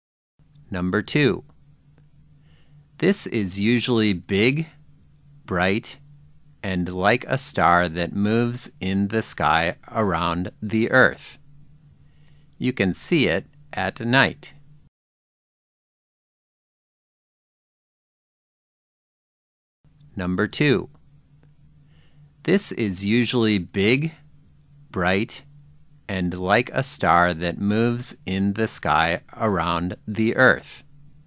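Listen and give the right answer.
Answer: the moon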